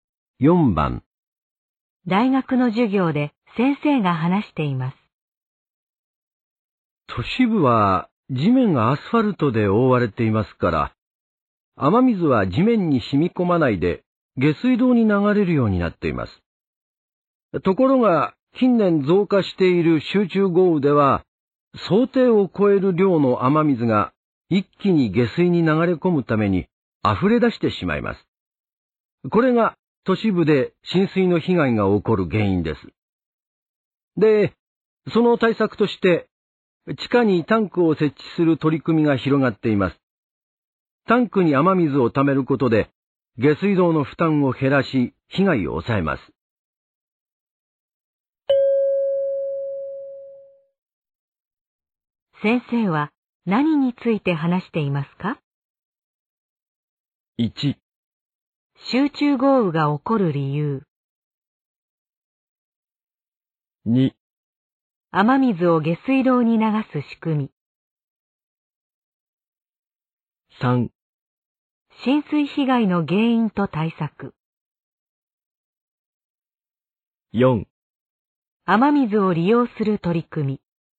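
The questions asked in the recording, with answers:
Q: 先生は何について話していますか?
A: 3: 浸水被害の原因と対策。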